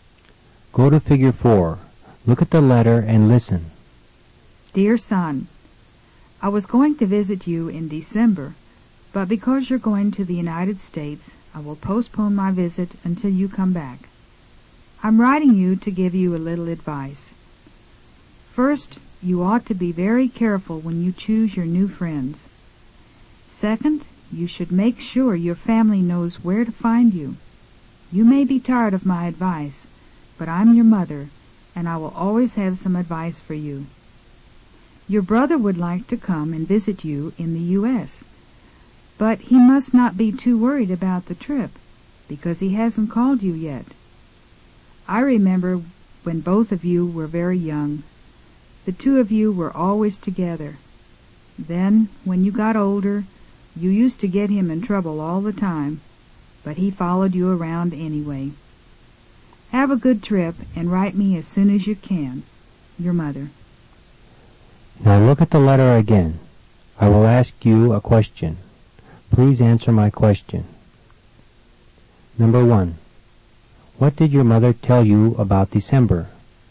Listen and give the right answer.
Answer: She told you that she was going to visit you in December.